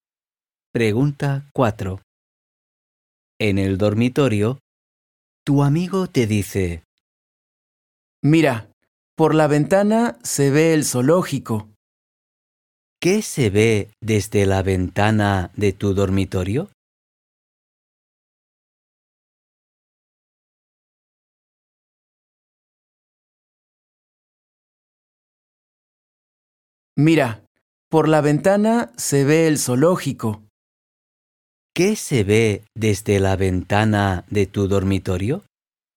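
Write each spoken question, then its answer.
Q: ¿Qué se ve desde la ventana de tu dormitorio?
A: el zoológico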